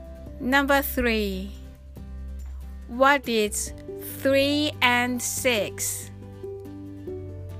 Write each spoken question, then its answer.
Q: what is 3 and 6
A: equals 9.